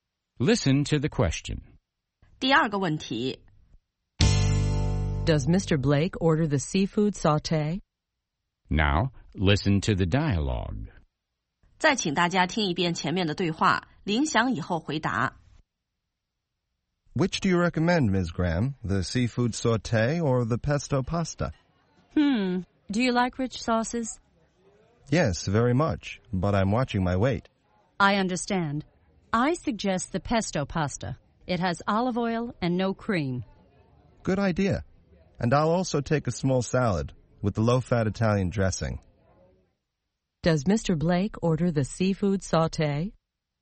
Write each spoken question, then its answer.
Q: Does Mr. Blake order the seafood sauté?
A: No, he doesn't. He orders the pesto pasta.